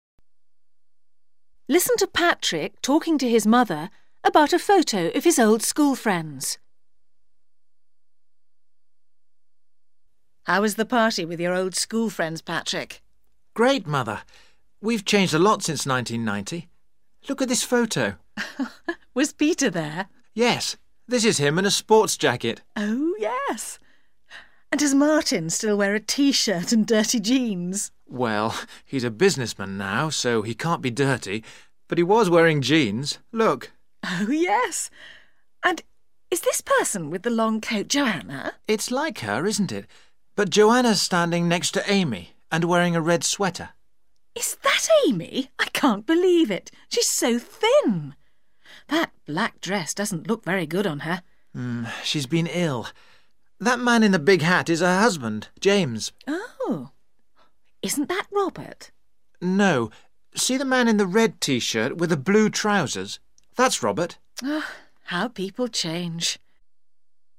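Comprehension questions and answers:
Listen to Patrick talking to his mother about a photo of his old school friends. Answer the following question by choosing A/B or C.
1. What is Martin wearing?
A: Jeans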